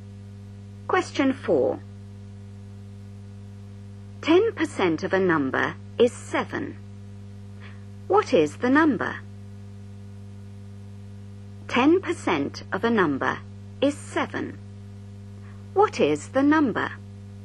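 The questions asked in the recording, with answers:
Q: 10% of a number is 7. What is the number?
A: 70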